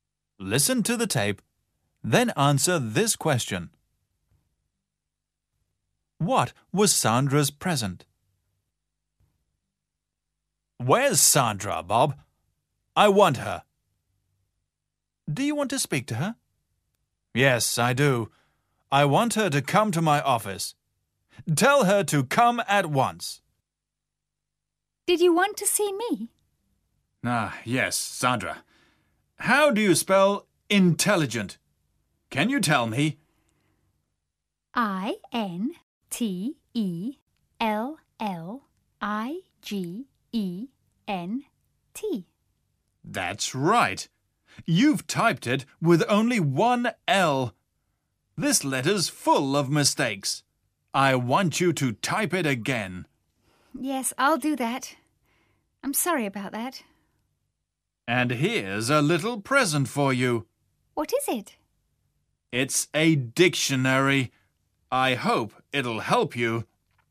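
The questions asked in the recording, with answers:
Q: What was Sandra's present?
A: A dictionary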